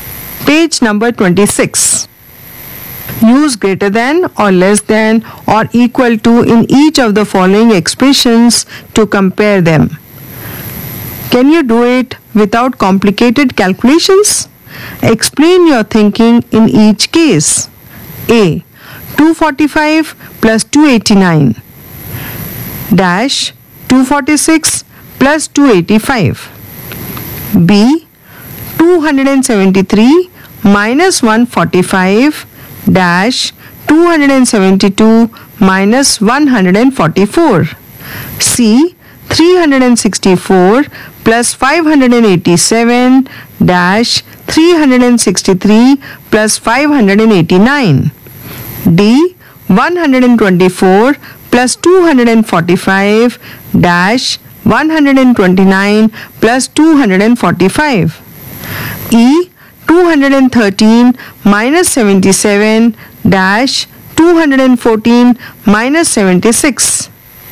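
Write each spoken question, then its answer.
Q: A. 245 plus 289 dash 246 plus 285.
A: greater than (534 > 531)

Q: 273 minus 145 dash 272 minus 144.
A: equal to (128 = 128)

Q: C. 364 plus 587 dash 363 plus 589.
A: less than (951 < 952)

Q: 124 plus 245 dash 129 plus 245.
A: less than (369 < 374)

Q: E. 213 minus 77 dash 214 minus 76.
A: less than (136 < 138)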